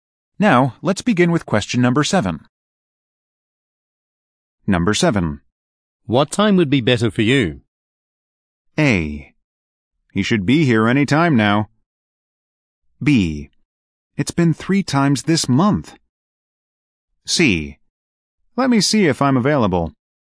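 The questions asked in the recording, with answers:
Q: What time would be better for you?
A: C: Let me see if I'm available.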